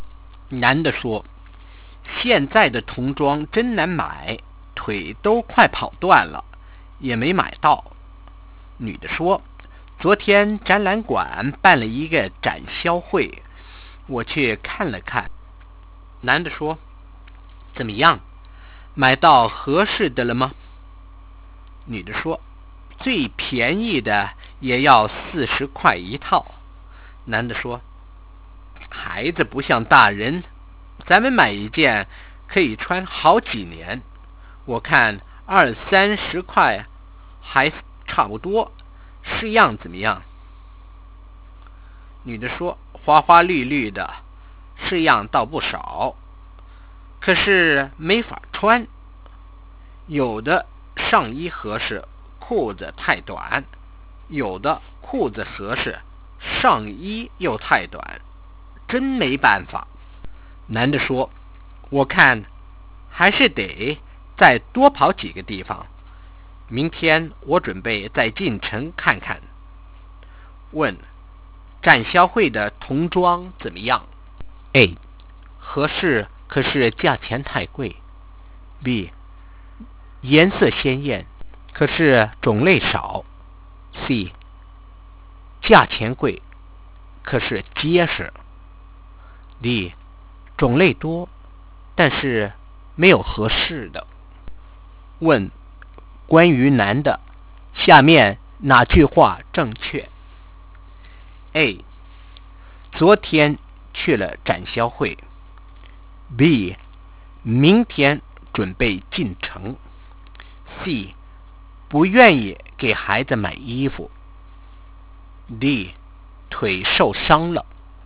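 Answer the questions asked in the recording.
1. D: 种类多,但是没有合适的。
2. B: 明天准备进城。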